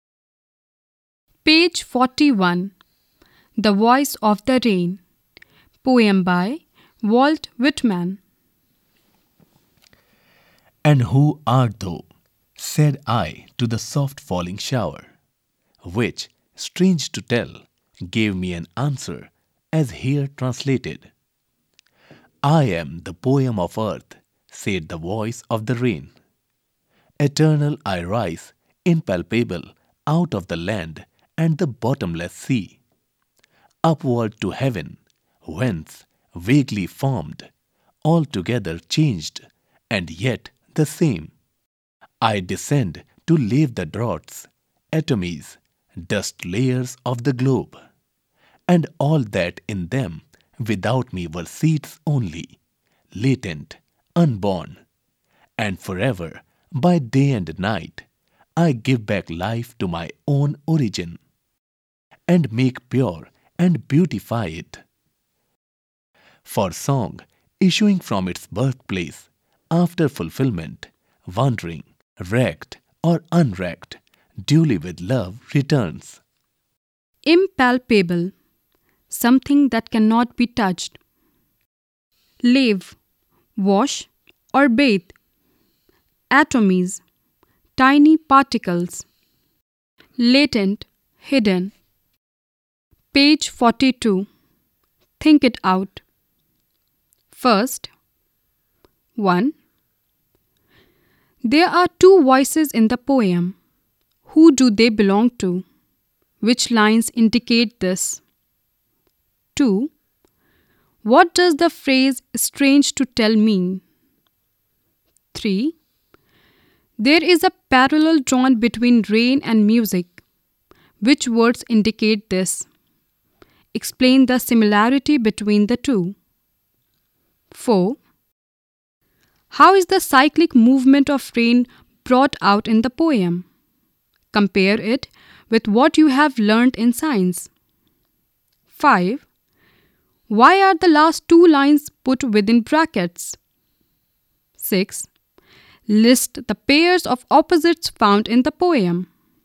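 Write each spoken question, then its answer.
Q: There are two voices in the poem. Who do they belong to?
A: The poet and the rain

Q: What does the phrase "strange to tell" mean?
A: It is surprising: the rain gave the poet an answer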